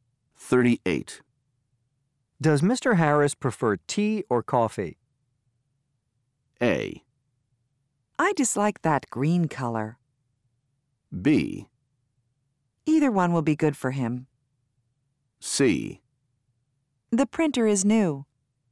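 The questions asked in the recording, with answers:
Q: Does Mr. Harris prefer tea or coffee?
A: B: Either one will be good for him.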